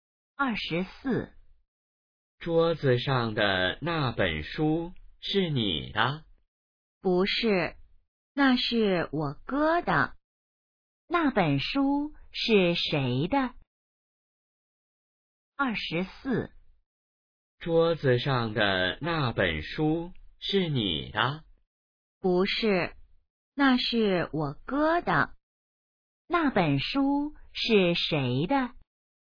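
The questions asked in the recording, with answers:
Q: 那本书是谁的?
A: 她哥哥的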